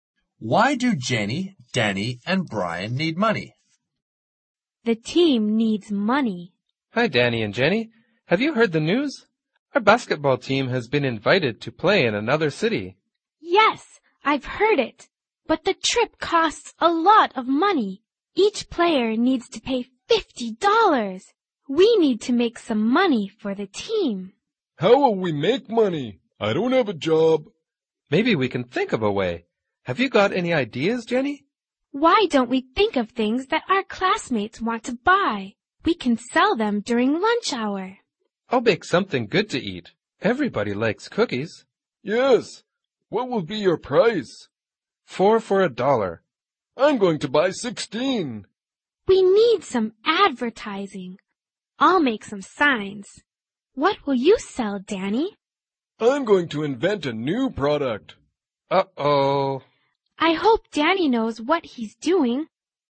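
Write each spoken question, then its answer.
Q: Why do Jenny, Danny, and Brian need money?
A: Their basketball team was invited to play in another city, and each player must pay $50 for the trip.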